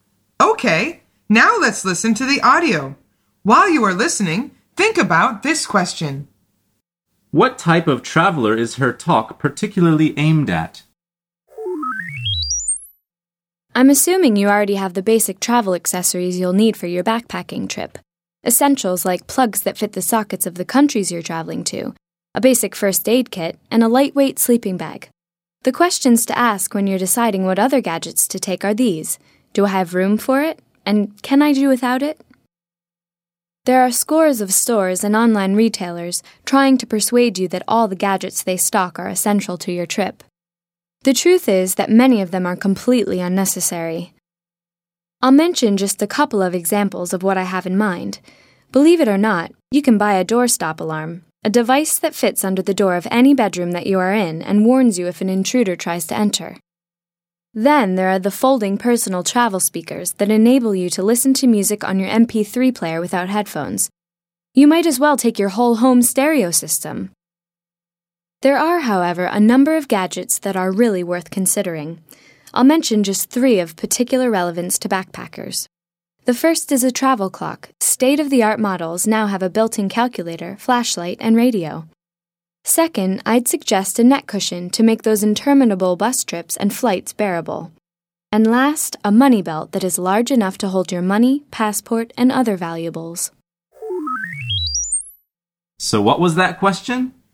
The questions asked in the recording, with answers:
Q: What type of traveler is her talk particularly aimed at?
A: The answer is people going backpacking.